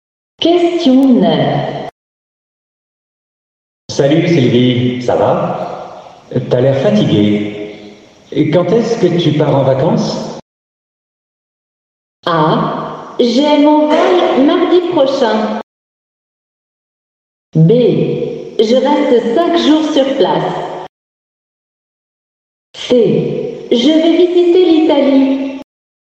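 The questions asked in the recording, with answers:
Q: Quand est-ce que tu pars en vacances?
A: A: J'ai mon vol mardi prochain.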